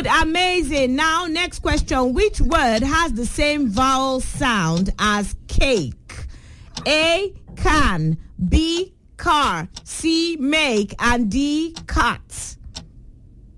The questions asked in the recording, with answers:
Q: Which word has the same vowel sound as cake?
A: C is make. The answer is make.